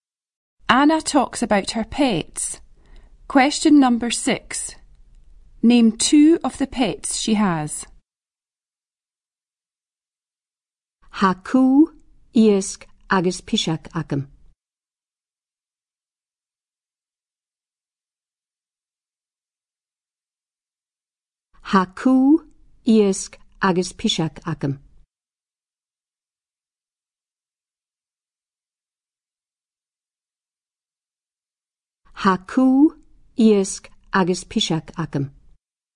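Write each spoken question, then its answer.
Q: Name 2 of the pets she has.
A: A dog and a cat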